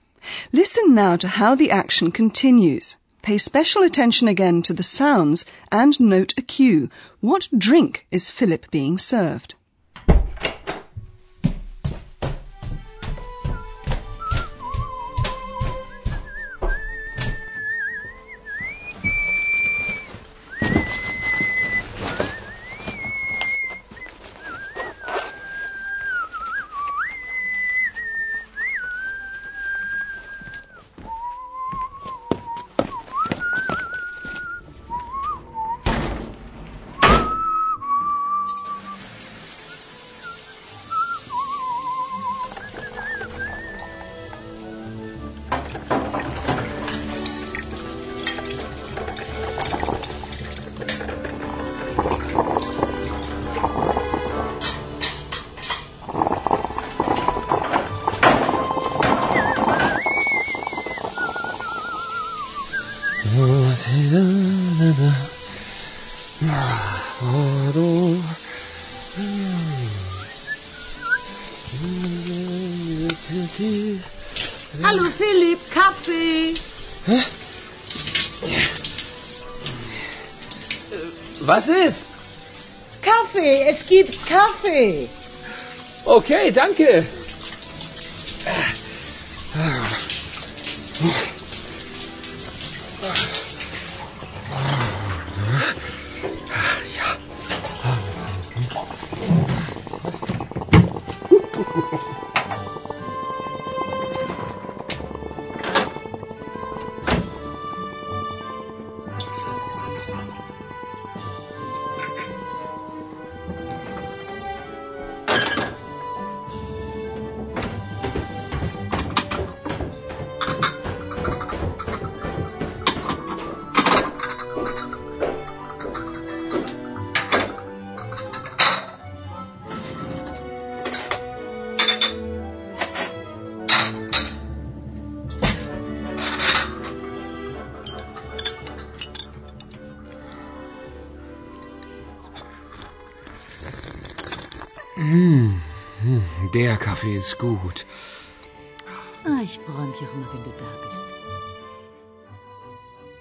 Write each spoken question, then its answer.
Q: What drink is Philip being served?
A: he's treated to coffee by Hannah